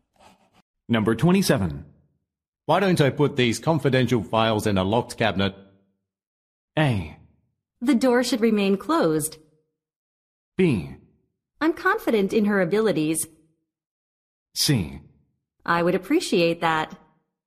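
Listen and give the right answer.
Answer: C: I would appreciate that.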